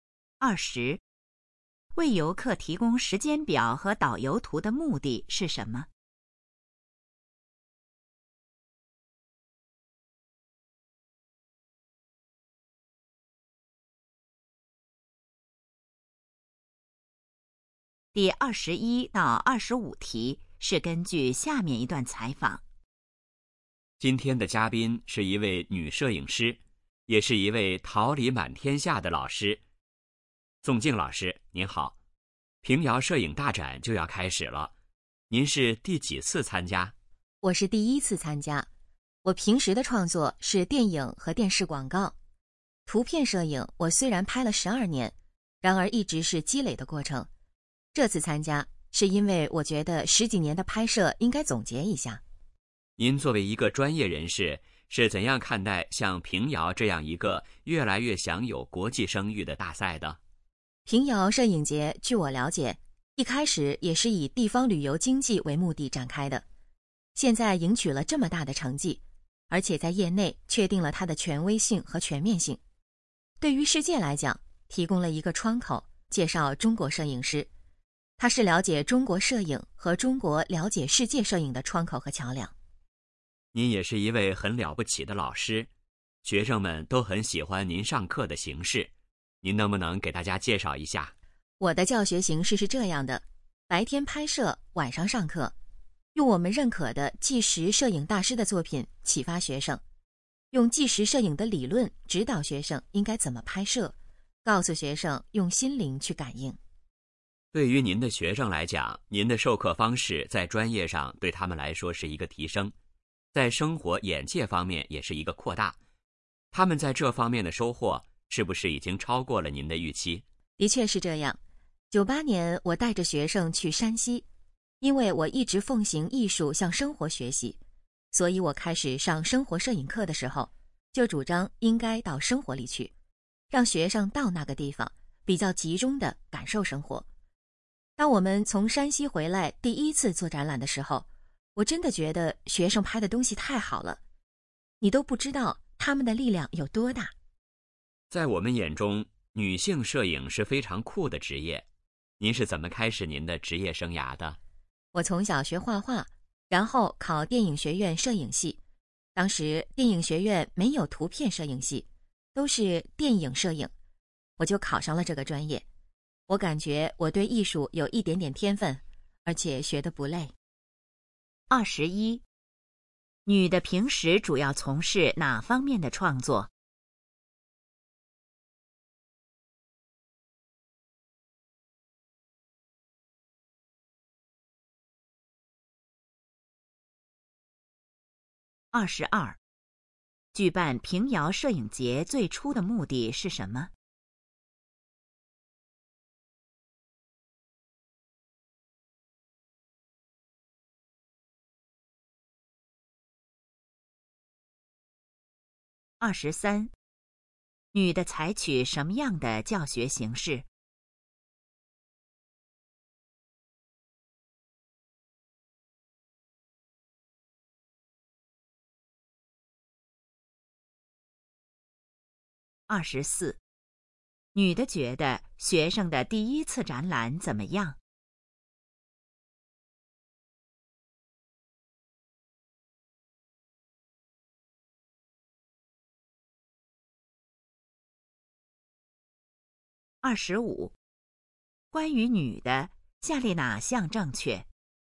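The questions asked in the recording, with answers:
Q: 女的平时主要从事哪方面的创作?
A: 电影和电视广告

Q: 举办平遥摄影节最初的目的是什么?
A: 发展地方旅游经济

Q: 女的采取什么样的教学形式?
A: 白天拍摄,晚上上课

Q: 女的觉得学生的第一次展览怎么样?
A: 拍得非常好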